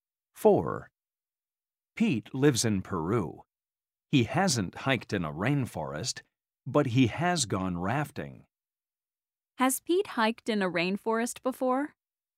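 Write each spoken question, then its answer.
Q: Has Pete hiked in a rainforest before?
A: No, he hasn't.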